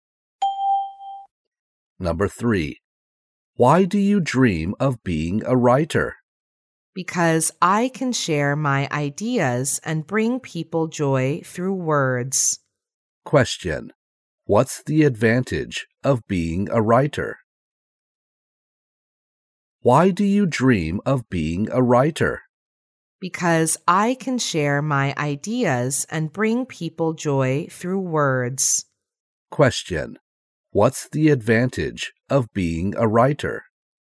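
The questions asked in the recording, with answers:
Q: What's the advantage of being a writer?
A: Sharing ideas and bringing people joy through words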